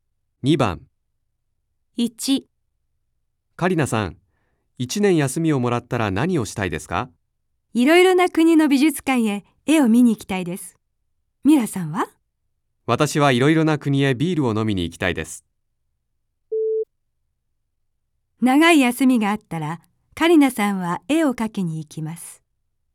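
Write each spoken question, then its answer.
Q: 長い休みがあったらカリナさんは絵を描きに行きます。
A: ×(絵を見に行きたい)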